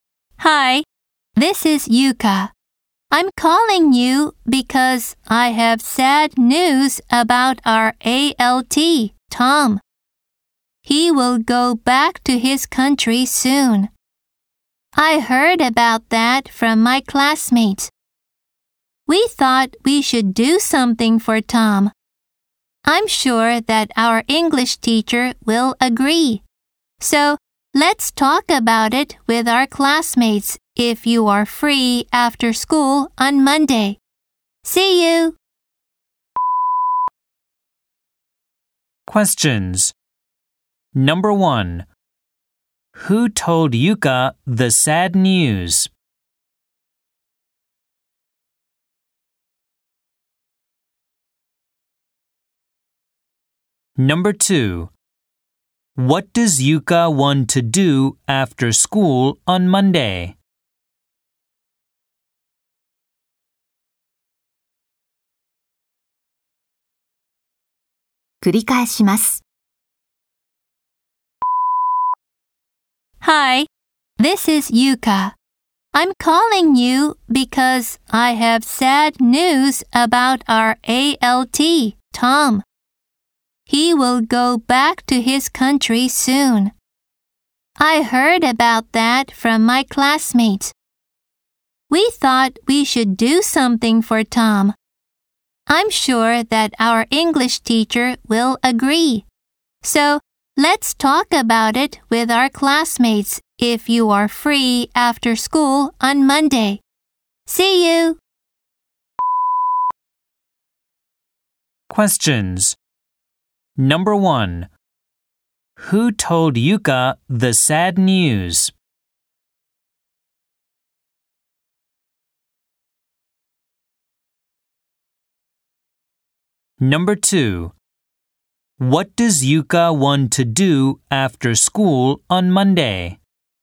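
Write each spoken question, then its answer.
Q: Who told Yuka the sad news?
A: Her classmates

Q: What does Yuka want to do after school on Monday?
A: Talk about doing something for Tom with their classmates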